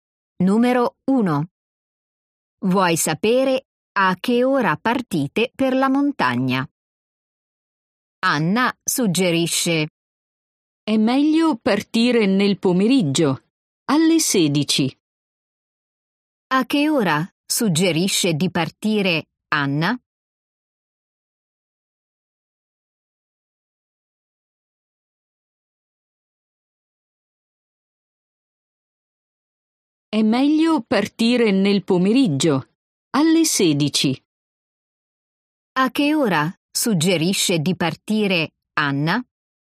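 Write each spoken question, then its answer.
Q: A che ora suggerisce di partire Anna?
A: Alle 16, nel pomeriggio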